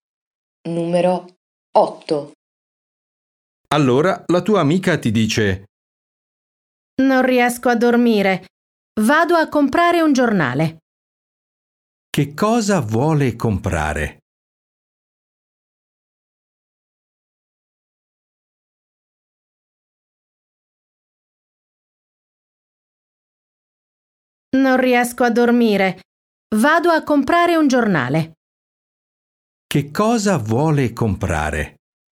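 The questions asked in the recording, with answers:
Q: Che cosa vuole comprare?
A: Un giornale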